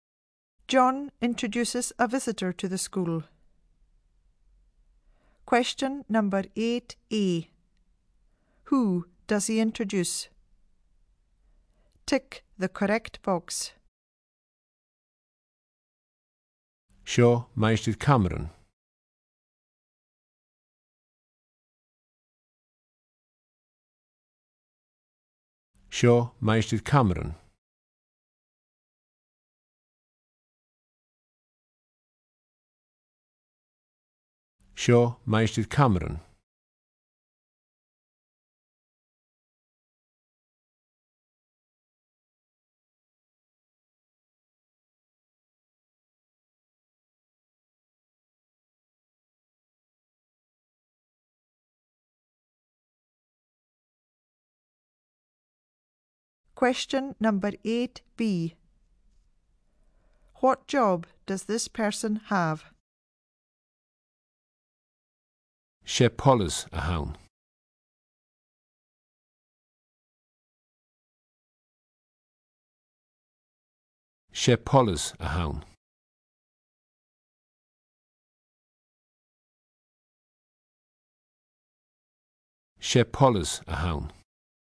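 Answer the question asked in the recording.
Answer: police officer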